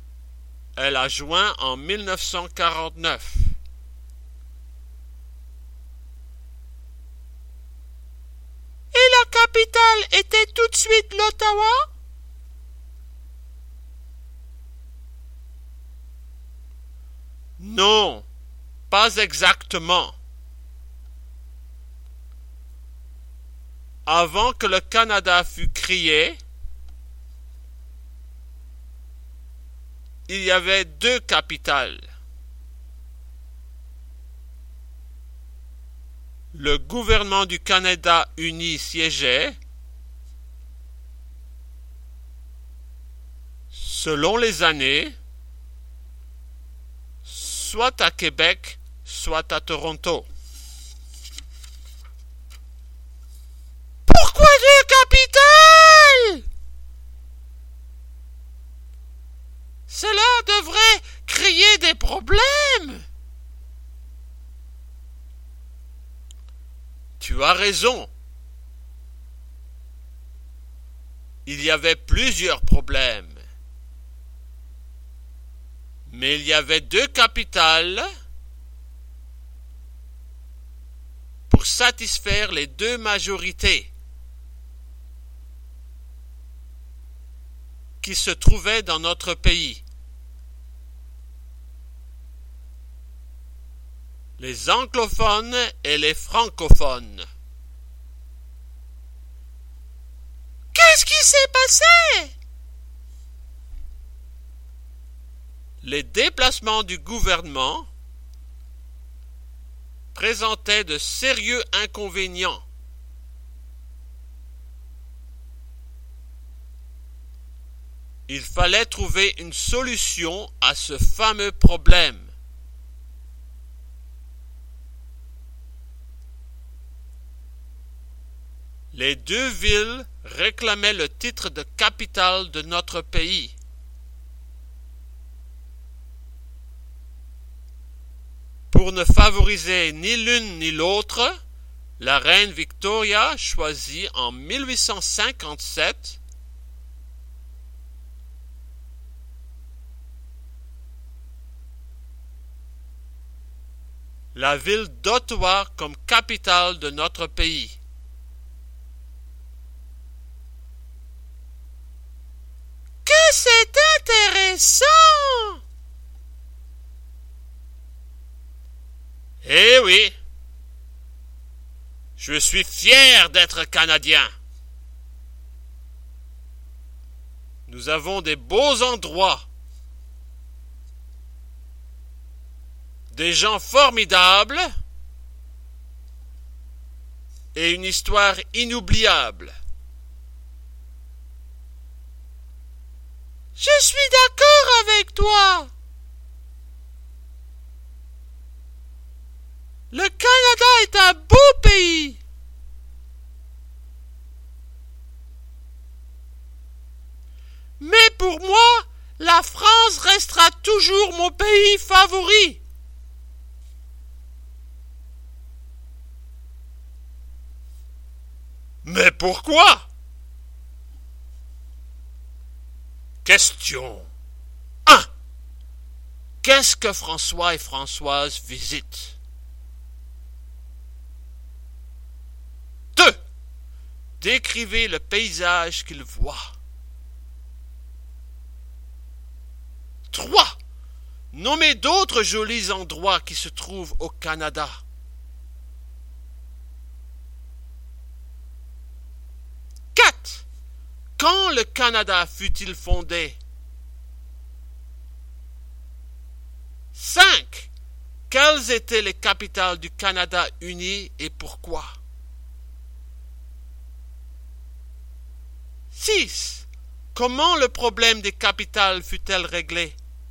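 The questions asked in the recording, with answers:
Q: Quelles étaient les capitales du Canada uni et pourquoi?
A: Québec et Toronto, pour satisfaire les deux majorités, les anglophones et les francophones

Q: Comment le problème des capitales fut-elle réglé?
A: En 1857, la reine Victoria choisit Ottawa comme capitale, pour ne favoriser ni l'une ni l'autre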